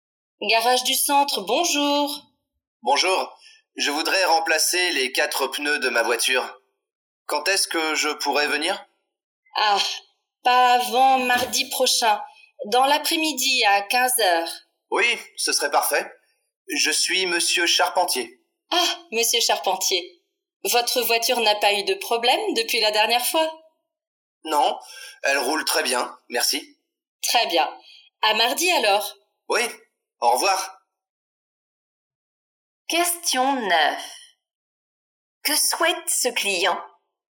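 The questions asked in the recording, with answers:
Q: Que souhaite ce client ?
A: Remplacer les 4 pneus de sa voiture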